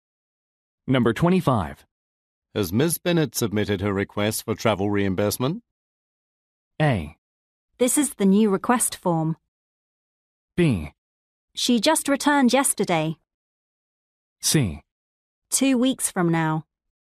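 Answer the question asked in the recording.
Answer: B: She just returned yesterday.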